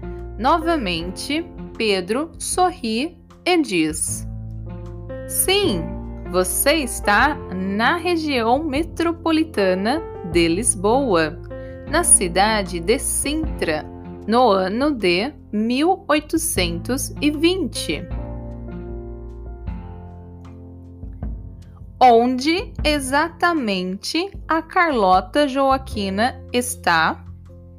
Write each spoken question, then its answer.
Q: onde exatamente a Carlota Joaquina está.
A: Ela está na região metropolitana de Lisboa, na cidade de Sintra, no ano de 1820.